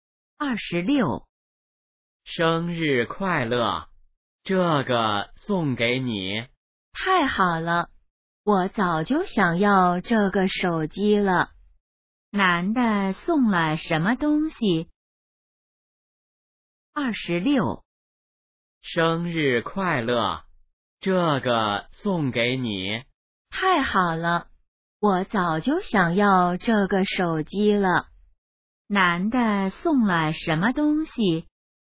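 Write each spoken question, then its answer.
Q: 男的送了什么东西?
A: 手机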